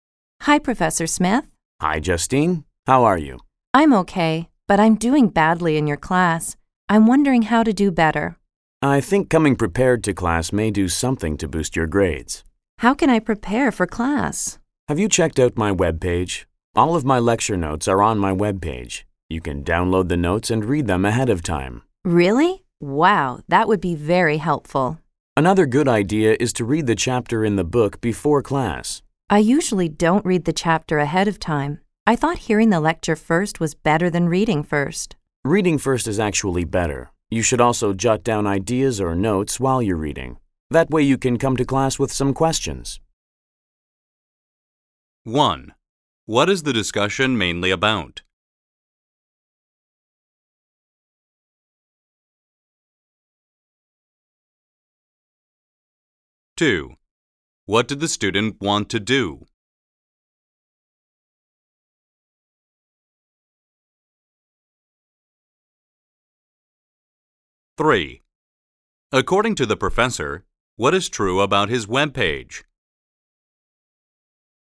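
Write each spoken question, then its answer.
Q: What is the discussion mainly about?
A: How the student can prepare for class to improve her grades

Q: What did the student want to do?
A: Do better in the professor's class

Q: According to the professor, what is true about his webpage?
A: All of his lecture notes are on it to download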